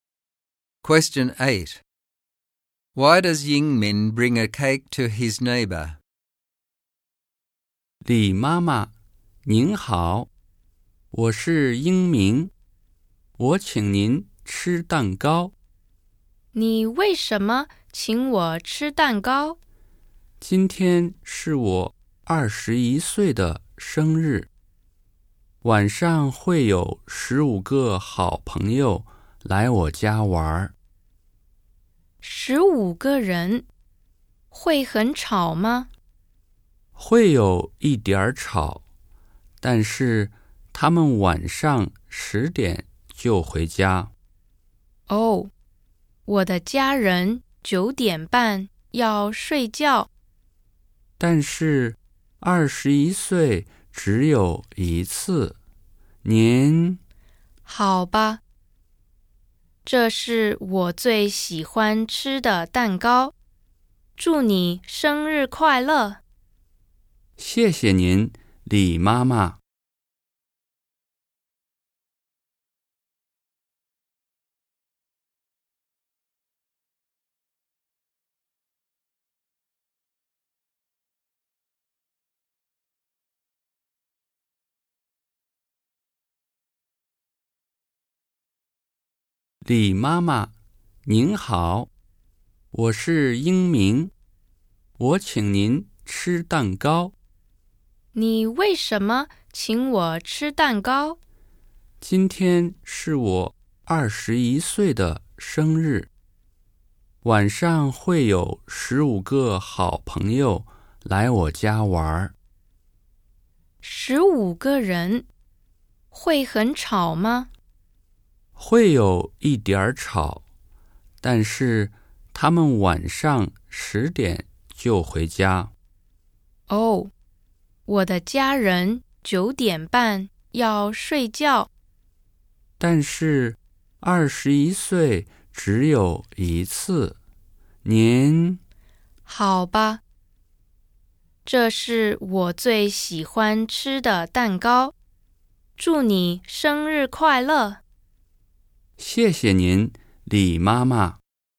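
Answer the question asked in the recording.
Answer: It is his 21st birthday and 15 friends are coming tonight, which may be a bit noisy, so he wants to keep her happy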